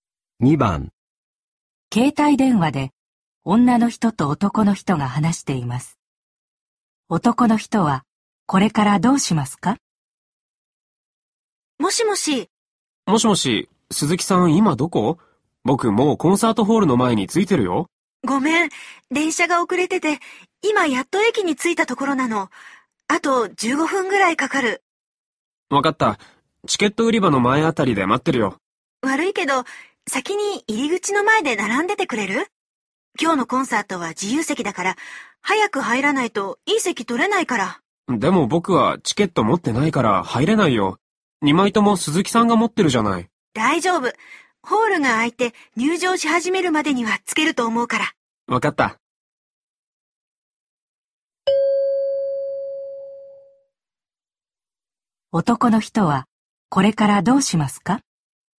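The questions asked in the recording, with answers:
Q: 男の人はこれからどうしますか?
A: 入り口の前で並んで待つ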